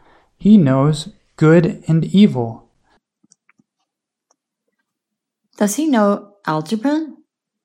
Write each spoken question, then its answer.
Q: Does he know algebra?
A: No, he knows good and evil.